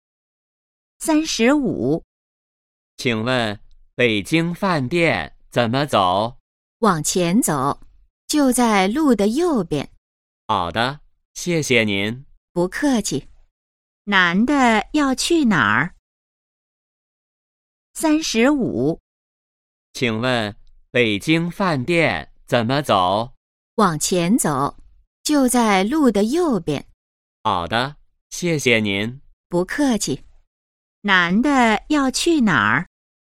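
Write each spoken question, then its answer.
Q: 男的要去哪儿?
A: 北京饭店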